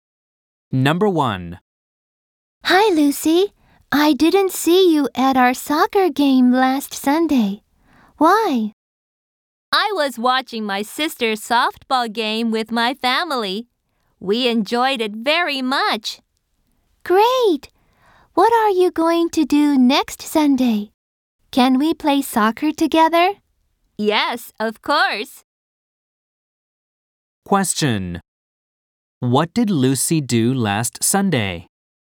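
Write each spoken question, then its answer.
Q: What did Lucy do last Sunday?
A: She watched her sister's softball game with her family.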